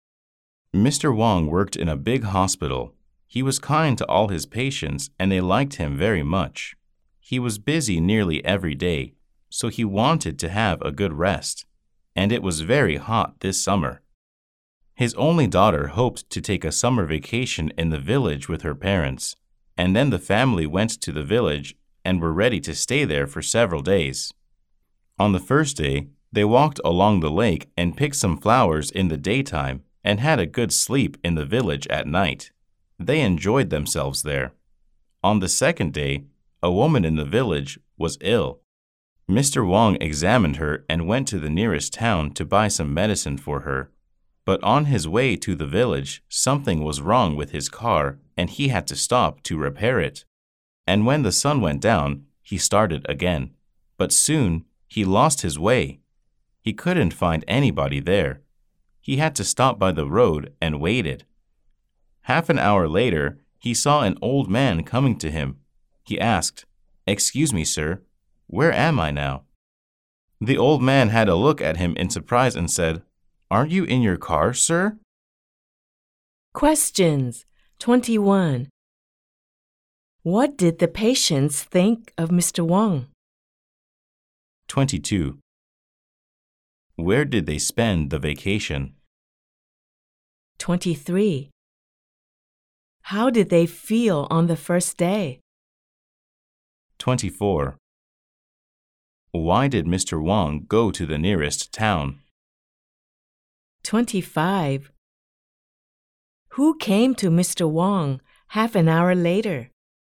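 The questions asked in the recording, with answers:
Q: What did the patients think of Mr. Wong?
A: They liked him very much; he was kind

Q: Where did they spend the vacation?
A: In the village

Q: How did they feel on the first day?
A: They enjoyed themselves

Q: Why did Mr. Wong go to the nearest town?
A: To buy some medicine for an ill woman

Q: Who came to Mr. Wong half an hour later?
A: An old man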